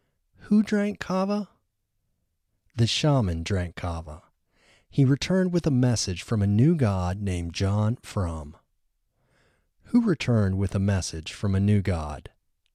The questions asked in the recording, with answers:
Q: Who returned with a message from a new god?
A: The shaman returned with a message from a new god.